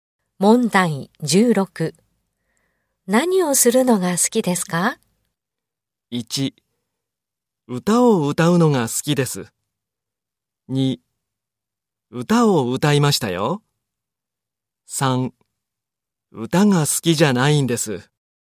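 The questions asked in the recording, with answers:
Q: 何をするのが好きですか?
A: 3: 歌を歌うのが好きです。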